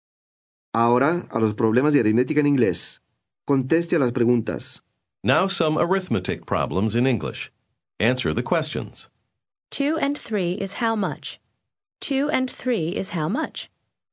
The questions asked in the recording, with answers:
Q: 2 and 3 is how much? 2 and 3 is how much?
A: 5. 2 and 3 is 5.